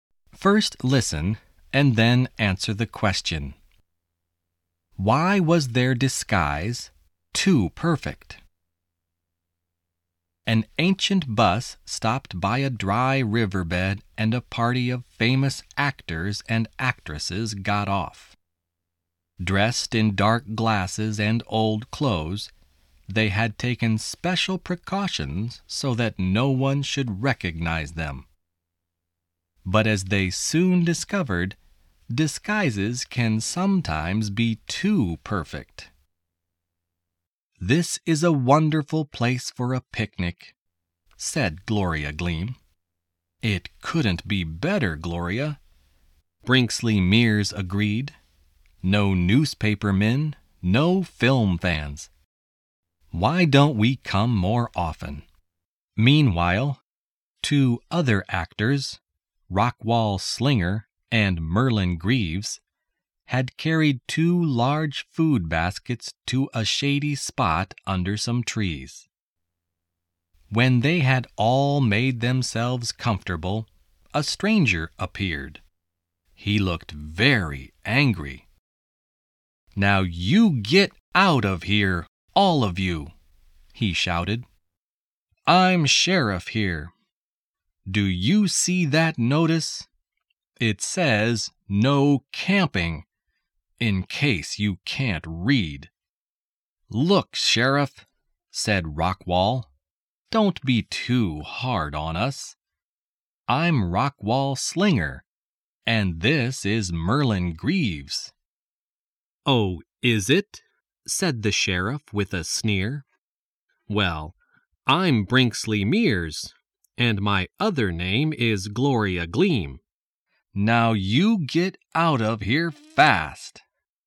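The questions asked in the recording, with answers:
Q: Why was their disguise too perfect?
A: The sheriff did not recognize them and did not believe they were famous actors.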